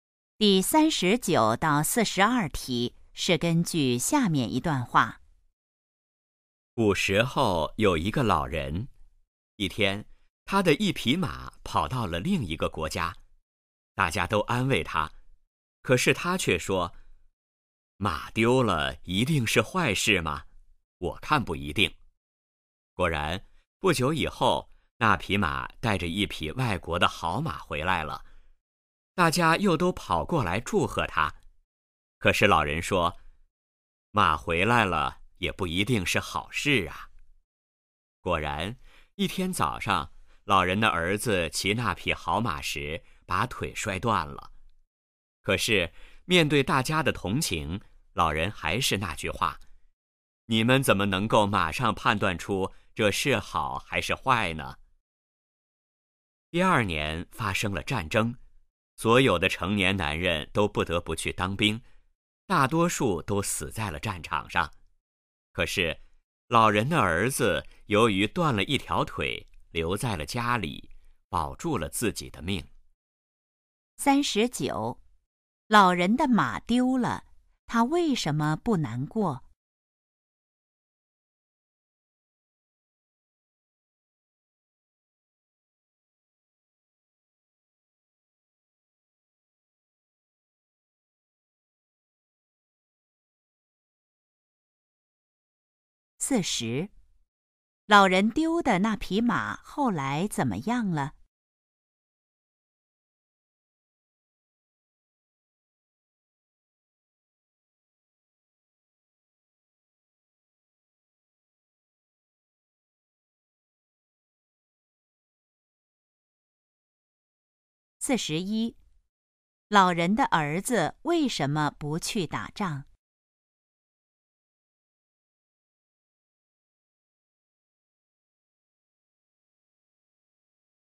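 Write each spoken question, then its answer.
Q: 老人丢的那匹马后来怎么样了?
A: 带着一匹外国的好马回来了

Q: 老人的儿子为什么不去打仗?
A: 他断了一条腿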